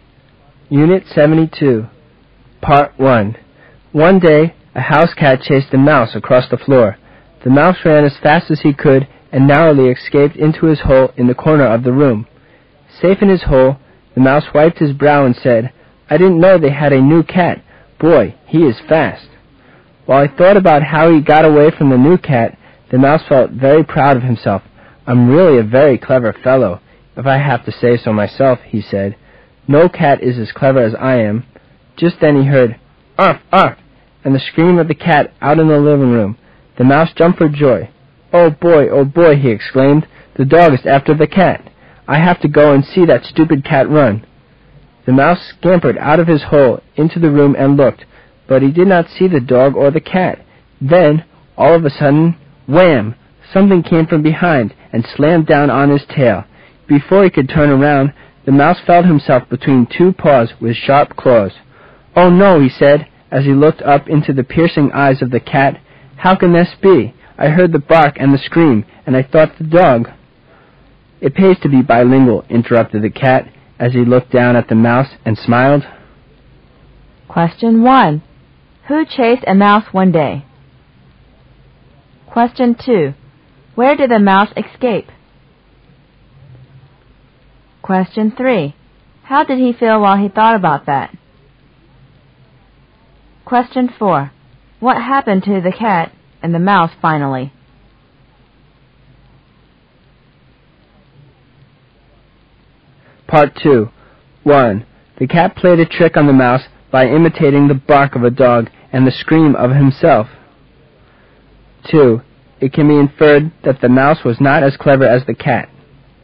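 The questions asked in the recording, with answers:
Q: Who chased a mouse one day?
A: A house cat

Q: Where did the mouse escape?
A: Into his hole in the corner of the room

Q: How did he feel while he thought about that?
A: Very proud of himself

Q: What happened to the cat and the mouse finally?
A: The cat caught the mouse

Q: The cat played a trick on the mouse by imitating the bark of a dog and the scream of himself.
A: True

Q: It can be inferred that the mouse was not as clever as the cat.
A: True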